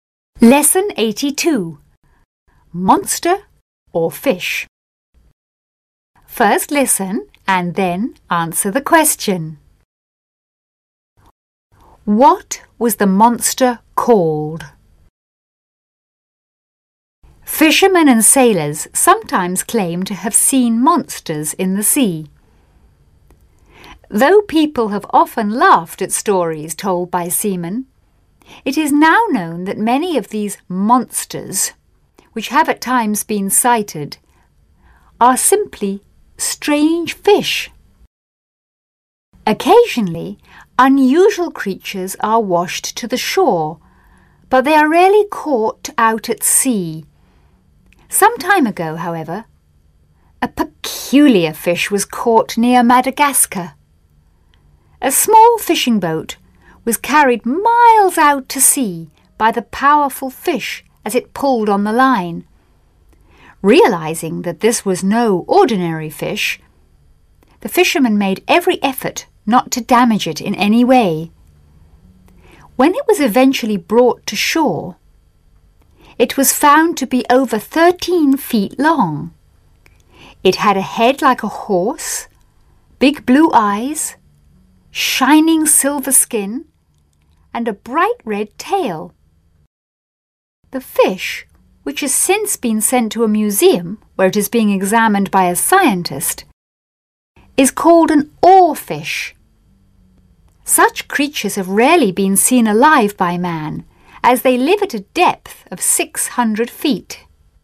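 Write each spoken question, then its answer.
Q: What was the monster called?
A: An oarfish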